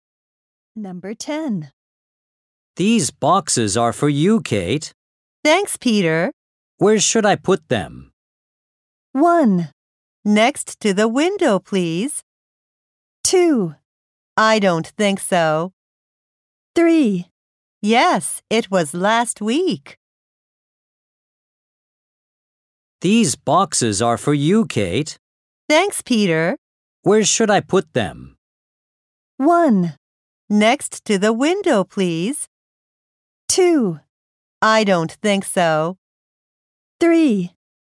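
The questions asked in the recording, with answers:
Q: Where should I put them?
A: 1: Next to the window, please.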